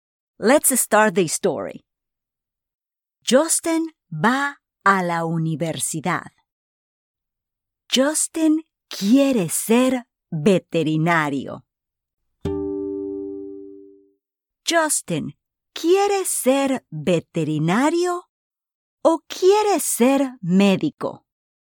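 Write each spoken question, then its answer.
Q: Justin, ¿quiere ser veterinario o quiere ser médico?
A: Quiere ser veterinario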